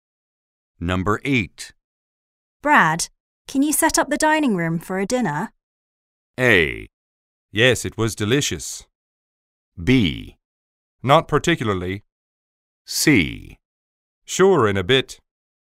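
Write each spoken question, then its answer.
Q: Brad, can you set up the dining room for a dinner?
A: C: Sure, in a bit.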